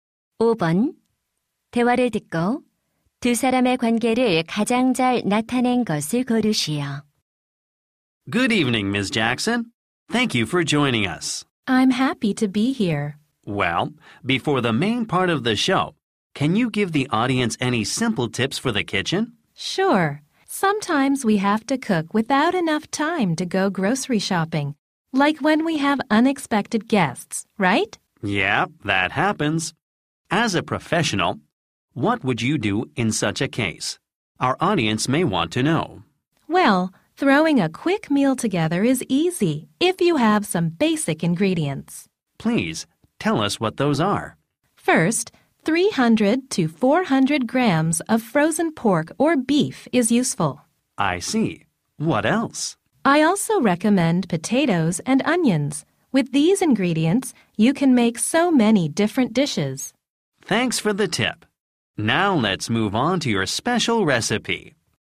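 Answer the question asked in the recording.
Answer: 방송 진행자 - 요리 전문가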